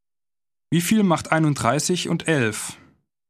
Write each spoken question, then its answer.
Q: Wie viel macht 31 und 11?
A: 42.